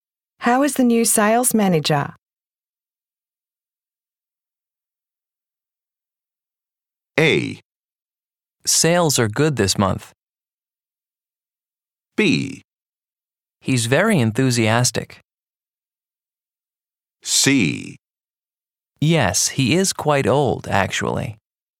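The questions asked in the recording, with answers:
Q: How is the new sales manager?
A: B: He's very enthusiastic.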